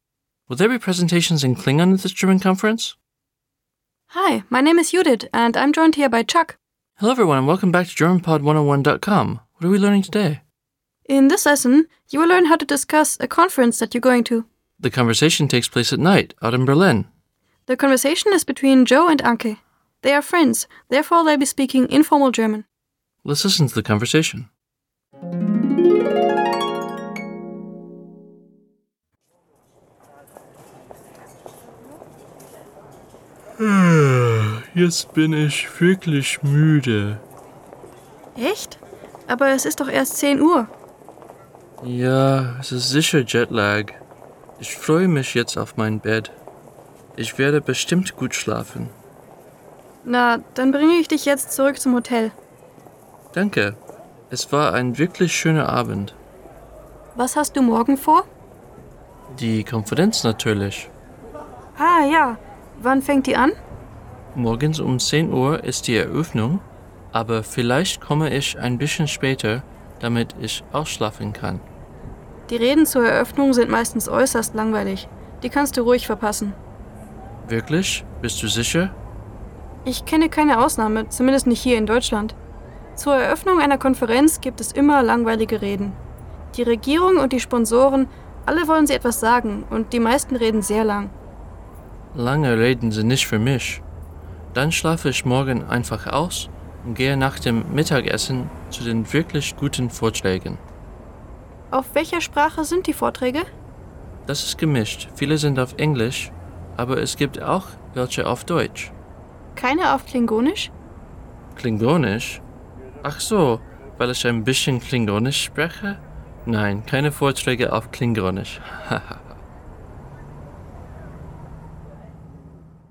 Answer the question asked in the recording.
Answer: No, no talks in Klingon.